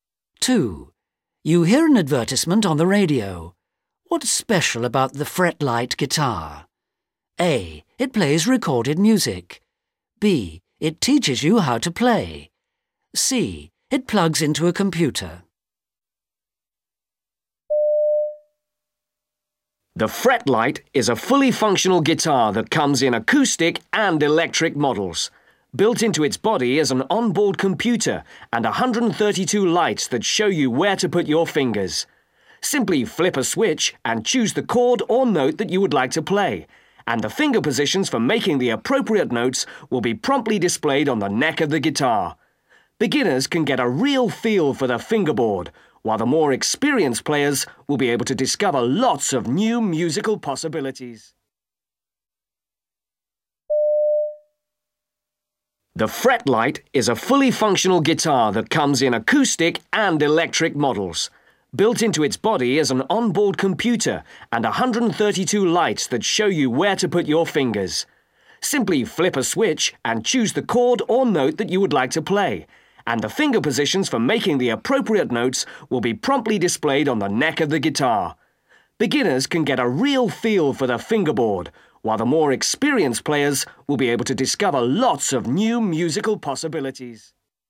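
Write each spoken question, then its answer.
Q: What's special about the fretlight guitar? A. It plays recorded music. B. It teaches you how to play. C. It plugs into a computer.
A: B: It teaches you how to play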